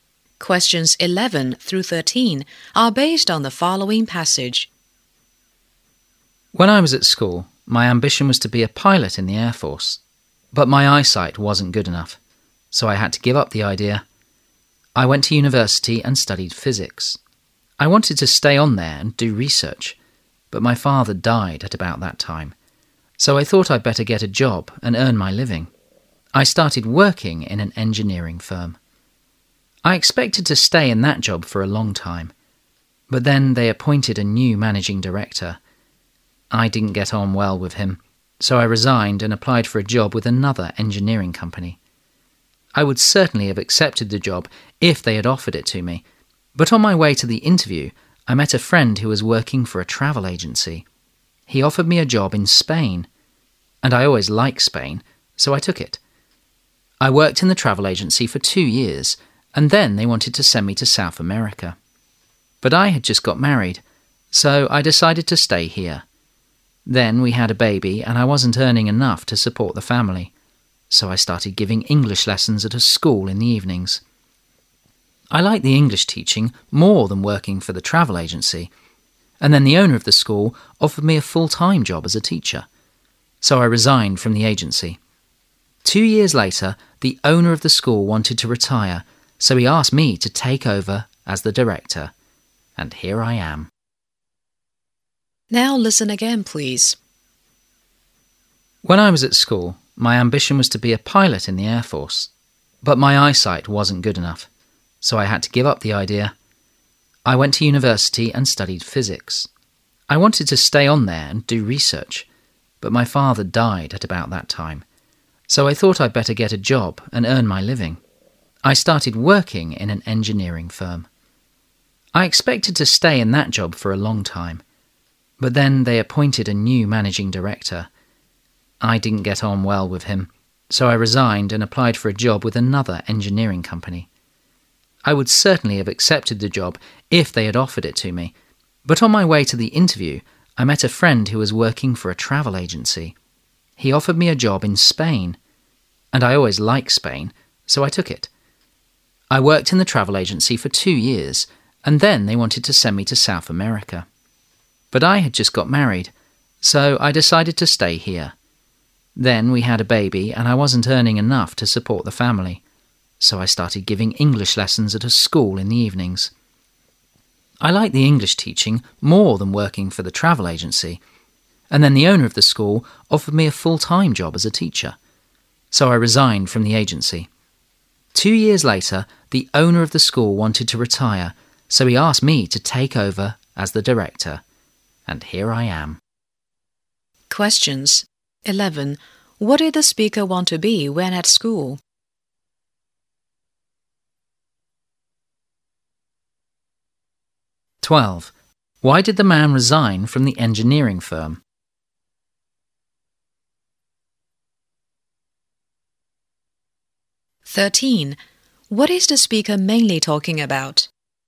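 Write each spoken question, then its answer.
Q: What did the speaker want to be when at school?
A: A pilot in the Air Force

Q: Why did the man resign from the engineering firm?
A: He didn't get on well with the new managing director

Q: What is the speaker mainly talking about?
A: How his career changed over the years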